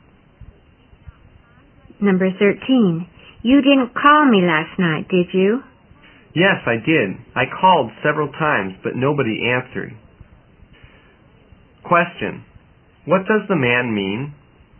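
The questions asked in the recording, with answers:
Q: what does the man mean?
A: He called several times but nobody answered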